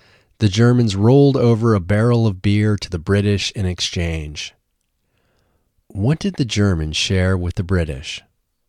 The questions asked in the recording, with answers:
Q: What did the Germans share with the British?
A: The Germans shared a barrel of beer with the British.